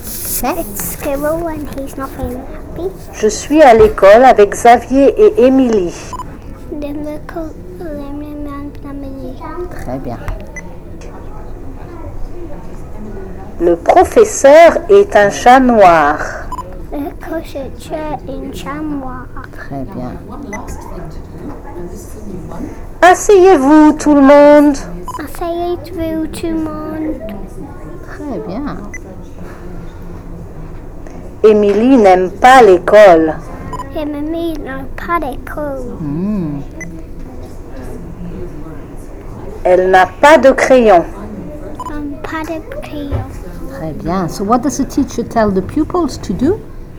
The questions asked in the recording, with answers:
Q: So what does the teacher tell the pupils to do?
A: Sit down.